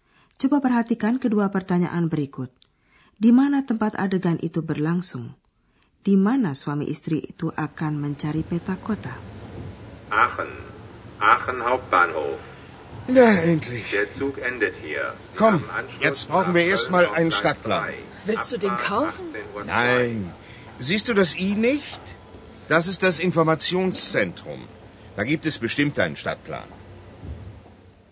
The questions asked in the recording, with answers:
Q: Di mana tempat adegan itu berlangsung?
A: adegan tersebut berlangsung di stasiun kereta api, tepatnya stasiun utama di Aachen.

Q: Di mana suami istri itu akan mencari peta kota?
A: di situ pun ada pusat informasi.